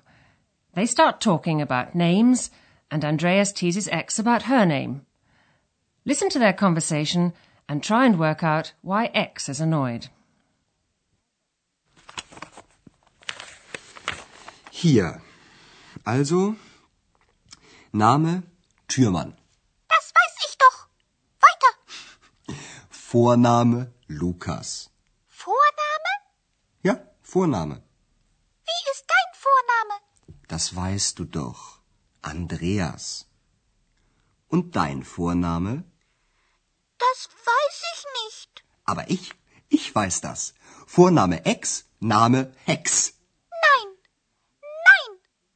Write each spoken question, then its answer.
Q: Listen to their conversation and try and work out why X is annoyed.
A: X is annoyed because Andreas has thought up a surname for her.